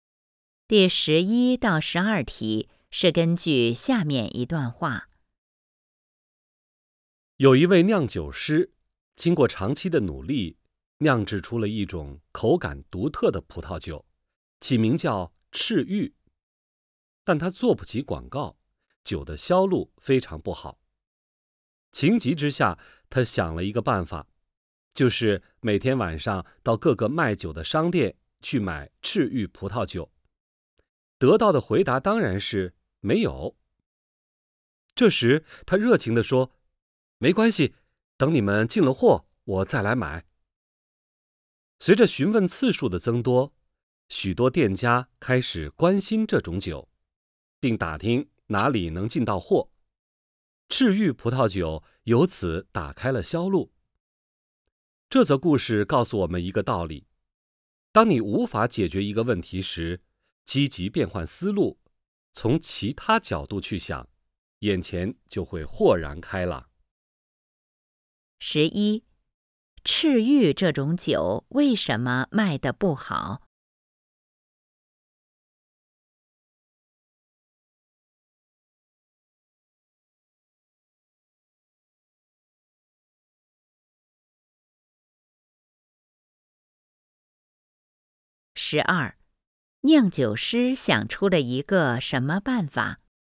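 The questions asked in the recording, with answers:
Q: 赤玉这种酒为什么卖得不好?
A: 没钱做广告

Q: 酿酒师想出了一个什么办法?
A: 每天晚上到各个商店去买赤玉葡萄酒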